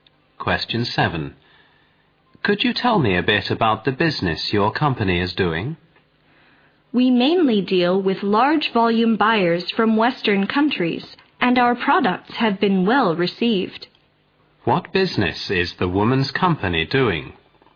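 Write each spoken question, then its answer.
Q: What business is the woman's company doing?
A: Selling products in large volumes to buyers from Western countries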